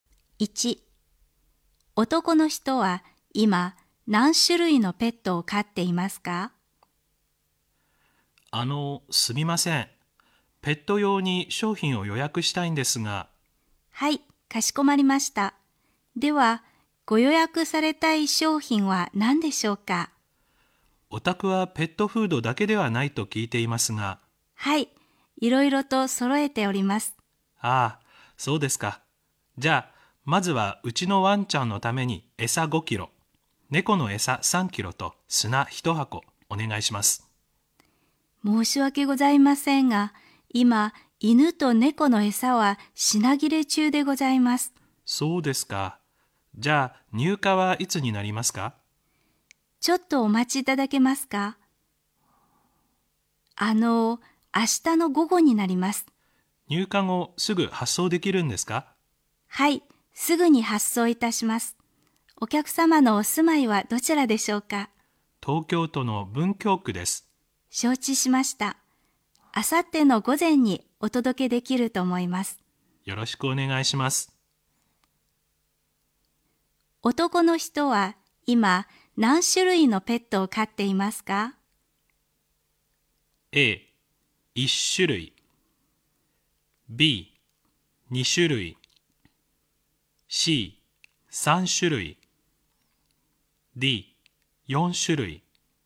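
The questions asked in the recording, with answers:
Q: 男の人は今何種類のペットを飼っていますか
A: B: 2種類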